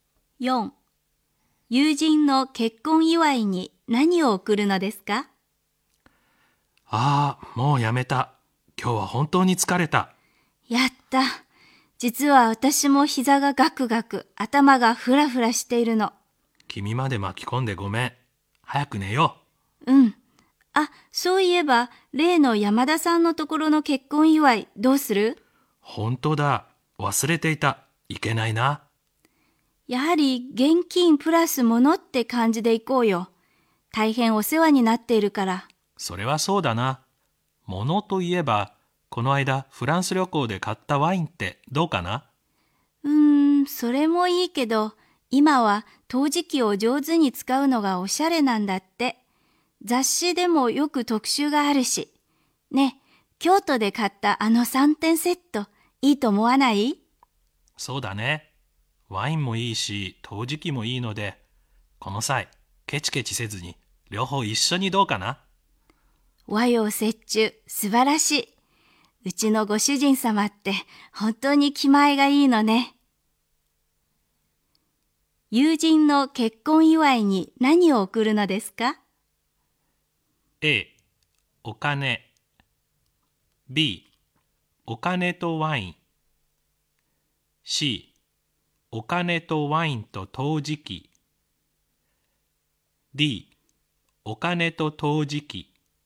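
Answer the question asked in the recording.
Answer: C: お金とワインと陶磁器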